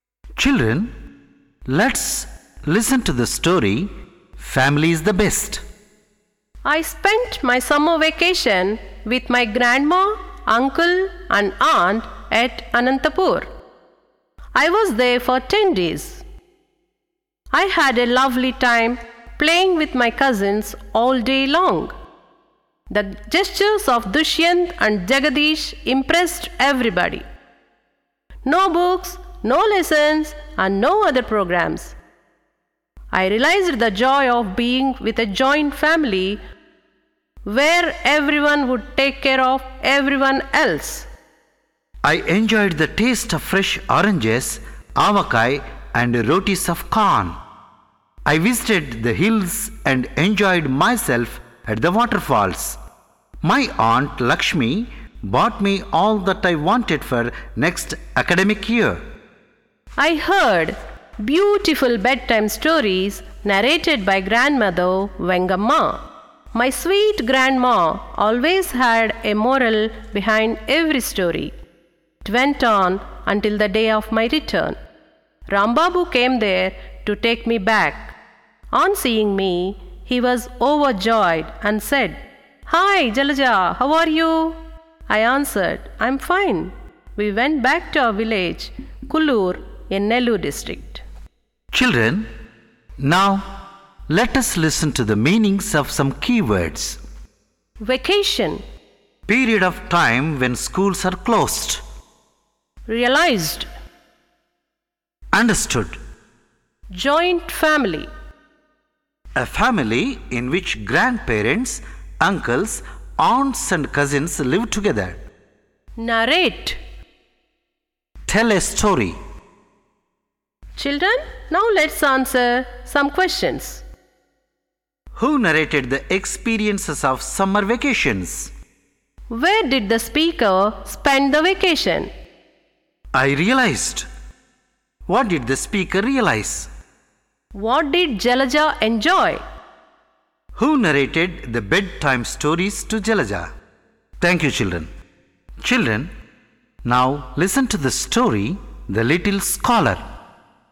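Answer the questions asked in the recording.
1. Jalaja
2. At Anantapur, with her grandma, uncle and aunt
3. The joy of being with a joint family where everyone takes care of everyone else
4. The taste of fresh oranges, avakai and rotis of corn
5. Grandmother Vengamma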